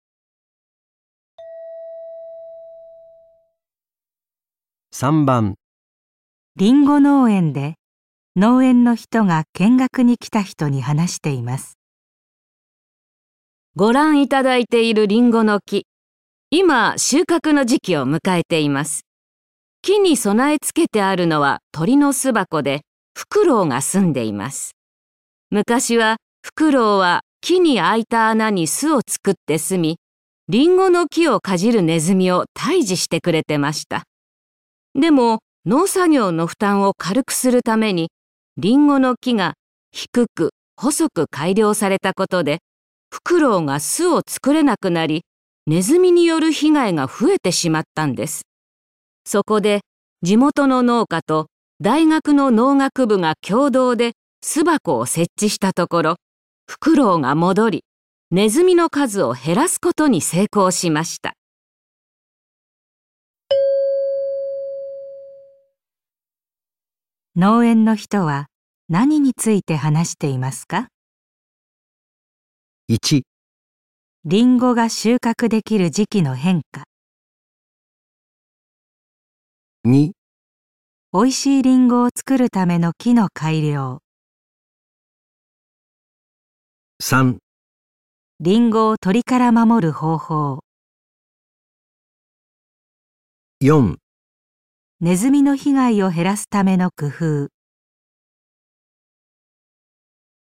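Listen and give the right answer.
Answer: ネズミの被害を減らすための工夫

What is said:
でも、農作業の負担を軽くするために、リンゴの木が低く、細く改良されたことでフクロウが巣を作れなくなり、鼠による被害が増えてしまったんです。そこで、地元の農家と大学の農学部が共同で巣箱を設置したところ、フクロウが戻り、鼠の数を減らすことに成功しました。
農園の人は 何について話していますか。

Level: N2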